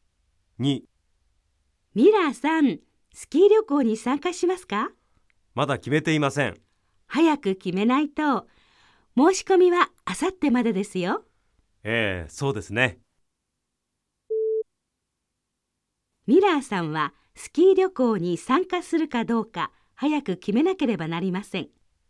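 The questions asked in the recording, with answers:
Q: ミラーさんはスキー旅行に参加するかどうか早く決めなければなりません。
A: ○(正しい)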